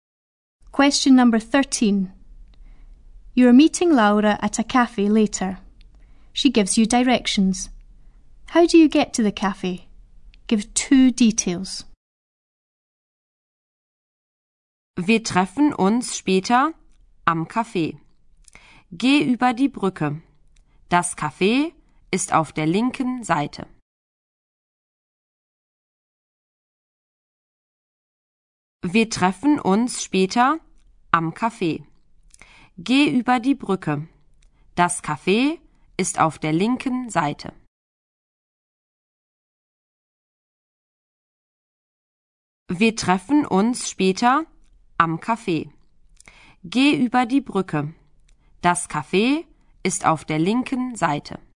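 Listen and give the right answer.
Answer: Go over the bridge; the cafe is on the left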